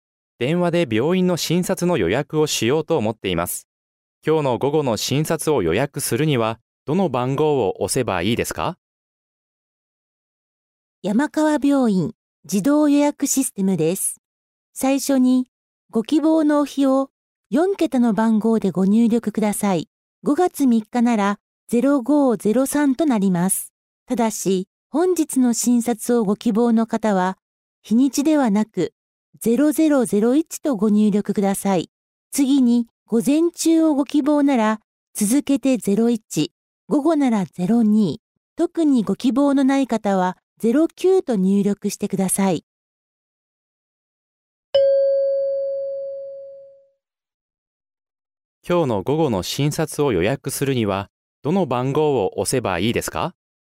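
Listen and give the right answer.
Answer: 000102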